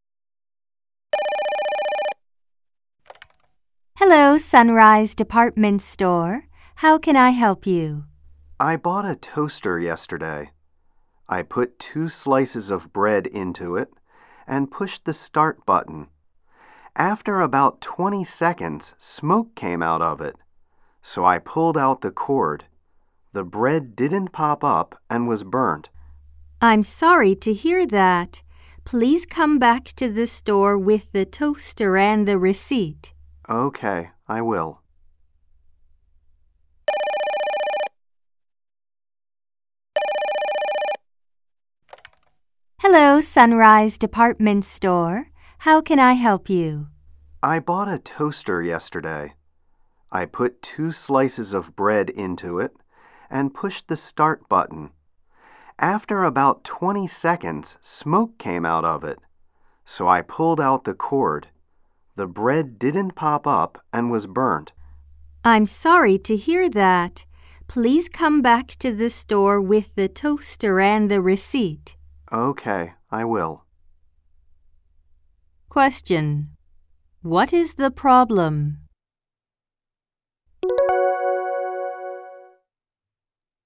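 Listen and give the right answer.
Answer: The new toaster smoked and burnt the bread.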